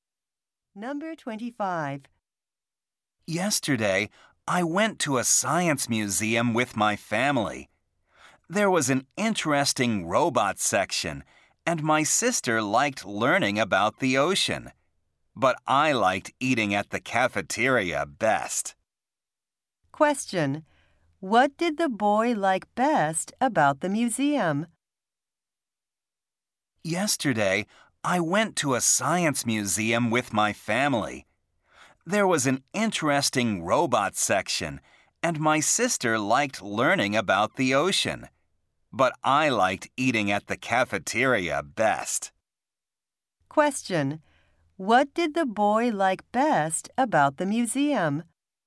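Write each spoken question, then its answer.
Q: What did the boy like best about the museum?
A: Eating at the cafeteria.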